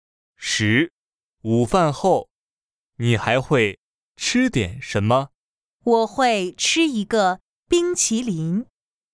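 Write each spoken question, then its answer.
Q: 午饭后,你还会吃点什么?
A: 一个冰淇淋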